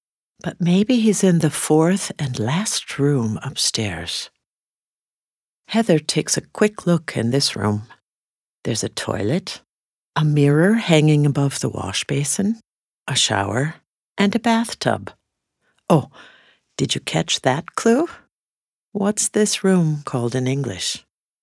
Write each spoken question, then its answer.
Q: What's this room called in English?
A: That's right, it's the bathroom.